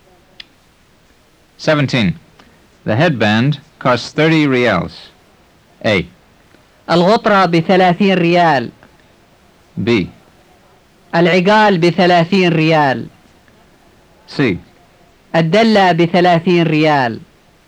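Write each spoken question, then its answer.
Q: The headband costs 30 reals.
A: B: العقال بثلاثين ريال.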